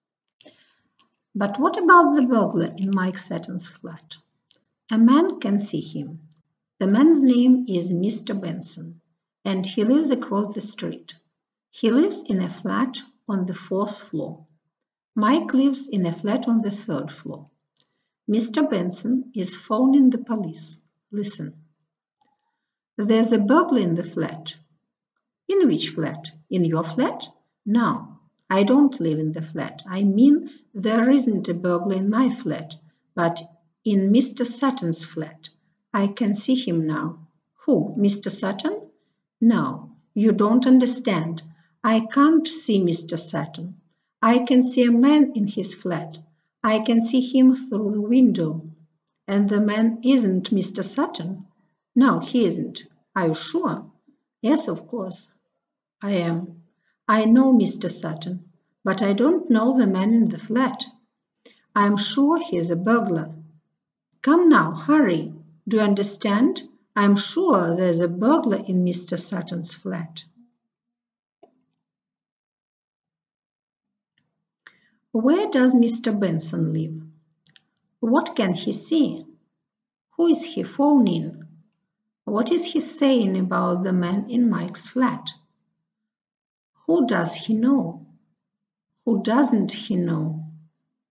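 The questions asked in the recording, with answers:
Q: Where does Mr. Benson live?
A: Across the street, in a flat on the fourth floor

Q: What can he see?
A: A burglar (a man) in Mike's flat

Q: Who is he phoning?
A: The police

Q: What is he saying about the man in Mike's flat?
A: He is sure he's a burglar

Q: Who does he know?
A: Mr. Sutton (Mike)

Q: Who doesn't he know?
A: The man in the flat (the burglar)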